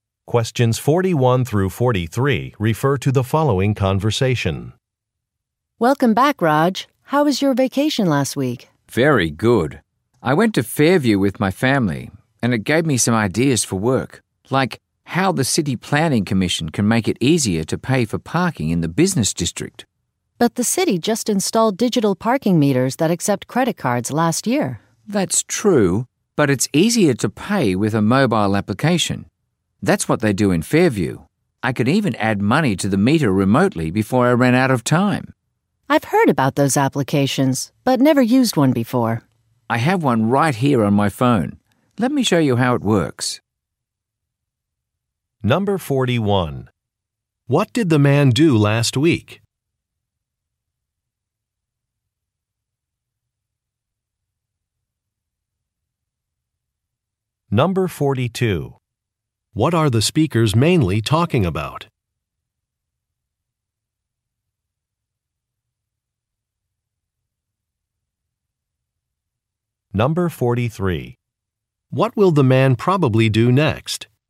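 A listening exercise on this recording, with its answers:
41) What did the man do last week?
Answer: He took a family vacation.

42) What are the speakers mainly talking about?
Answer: Methods of paying for parking

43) What will the man probably do next?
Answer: Demonstrate a mobile application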